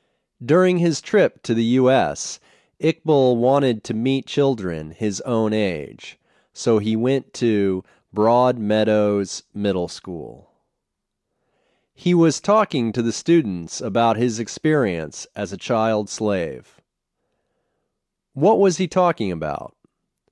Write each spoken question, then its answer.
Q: What was he talking about?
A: He was talking about his experience as a child slave.